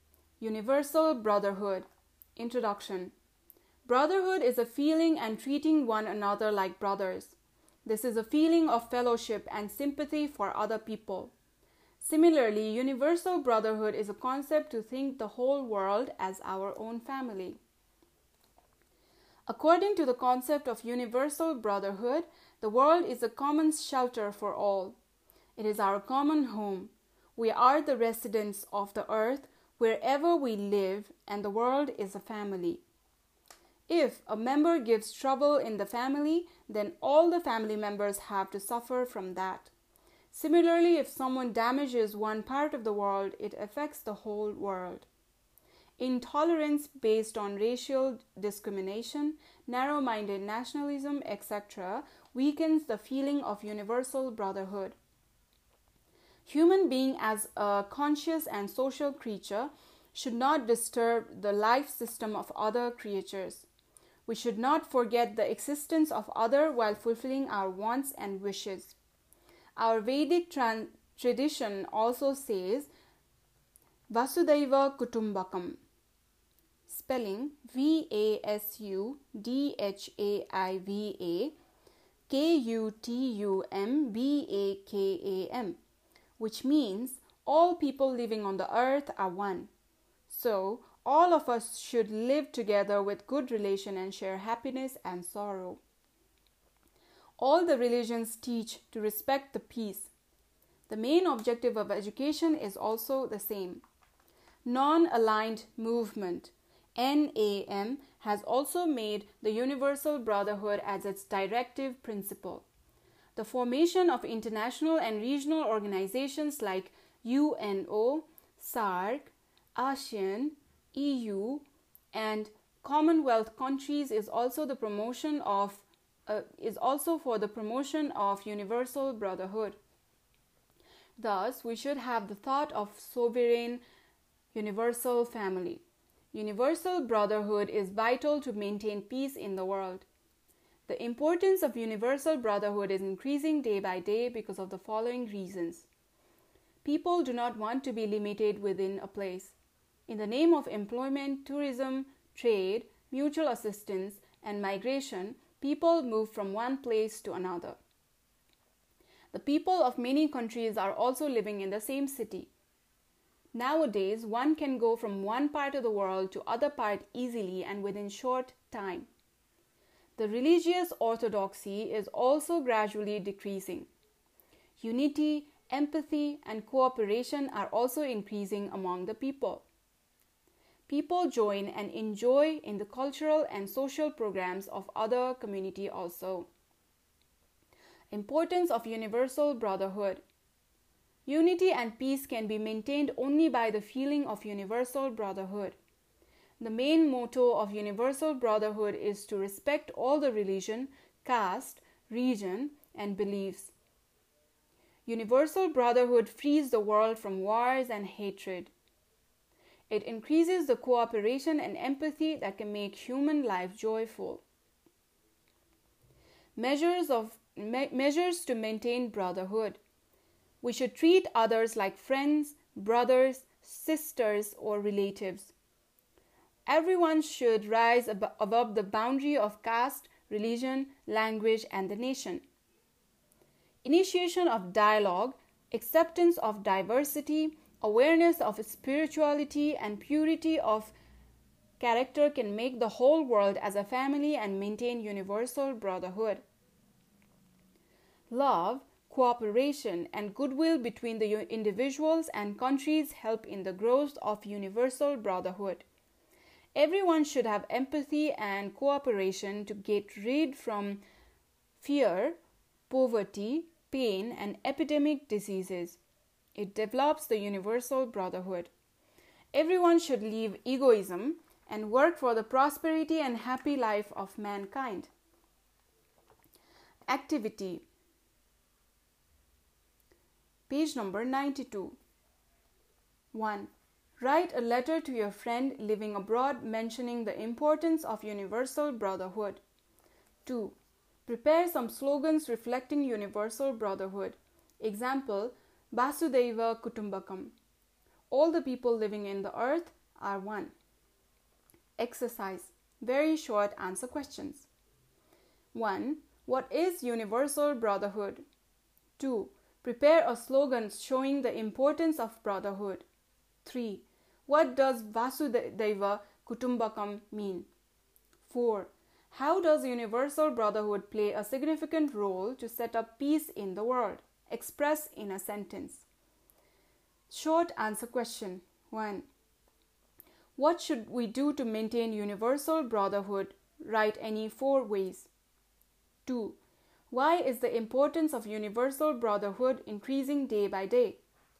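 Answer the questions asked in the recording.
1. The concept of thinking of the whole world as our own family
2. All people living on the earth are one
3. It frees the world from wars and hatred and increases cooperation and empathy
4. Treat others like family, rise above caste, religion, language and nation, start dialogue and accept diversity, and promote love, cooperation and goodwill
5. People move around for work, travel and trade, travel is easy, religious orthodoxy is decreasing, and unity and cooperation are increasing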